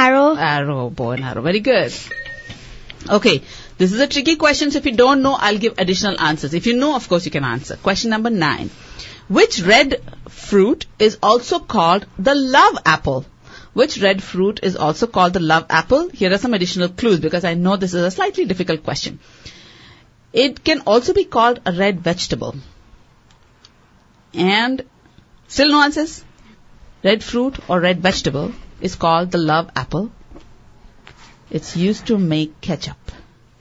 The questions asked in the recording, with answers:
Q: Which red fruit is also called the love apple?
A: Tomatoes,